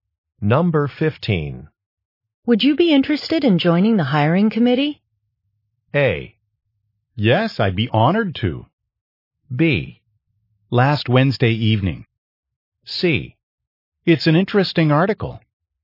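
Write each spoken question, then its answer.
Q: Would you be interested in joining the hiring committee?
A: A: Yes, I'd be honored to.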